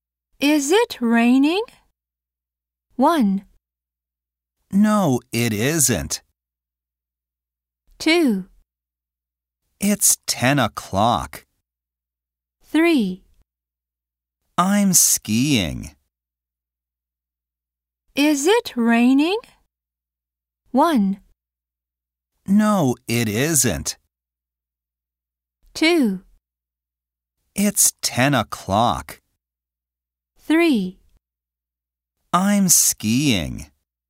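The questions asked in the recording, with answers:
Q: Is it raining?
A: 1: No, it isn't.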